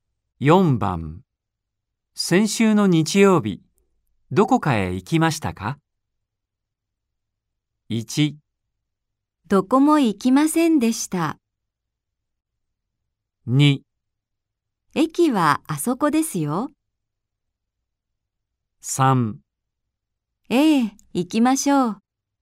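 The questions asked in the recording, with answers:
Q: 先週の日曜日、どこかへ行きましたか?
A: 1: どこも行きませんでした。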